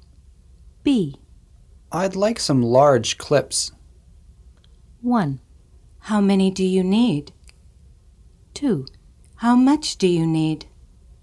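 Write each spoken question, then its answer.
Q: I'd like some large clips.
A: 1: How many do you need?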